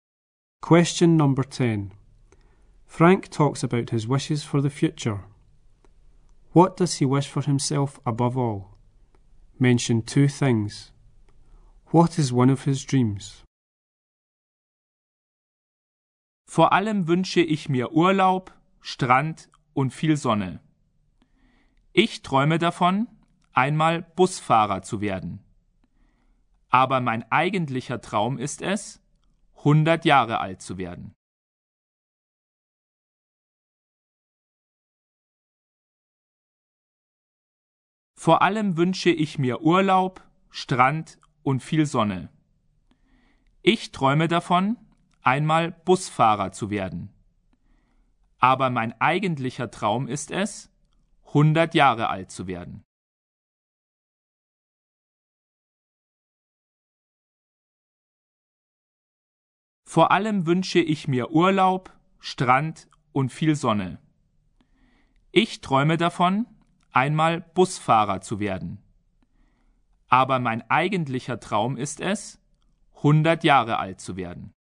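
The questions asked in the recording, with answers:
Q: What does he wish for himself above all?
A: Holidays, beach and lots of sun

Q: What is one of his dreams?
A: To become a bus driver / to live to 100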